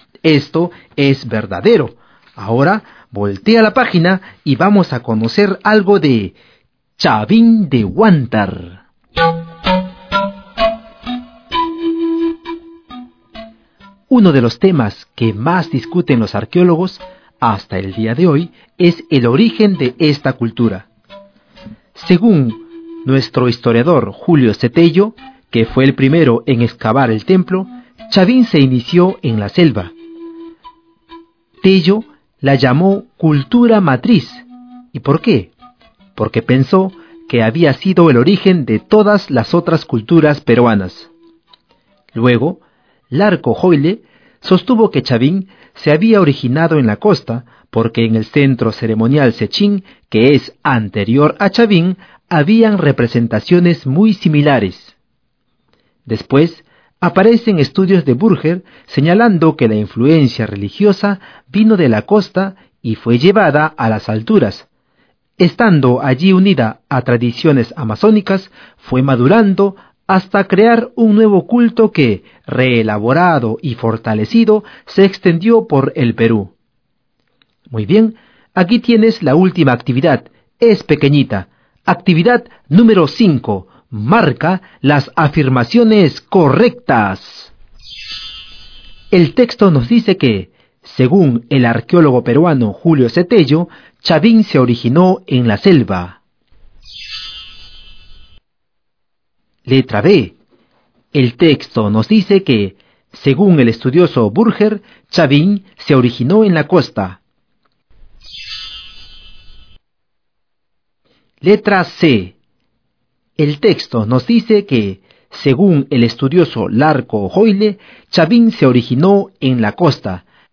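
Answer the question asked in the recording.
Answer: A y C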